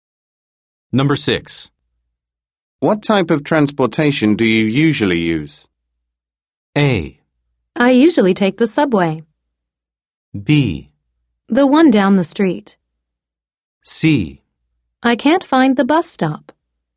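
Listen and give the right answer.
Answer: A: I usually take the subway.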